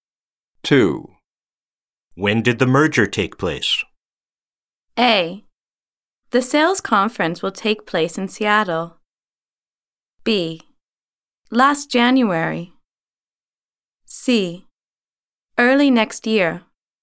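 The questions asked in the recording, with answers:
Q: When did the merger take place?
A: B: Last January.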